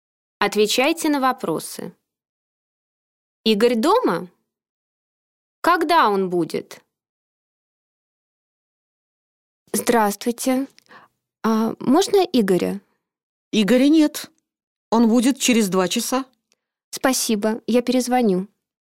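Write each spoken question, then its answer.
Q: Игорь дома?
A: Нет

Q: Когда он будет?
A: Через 2 часа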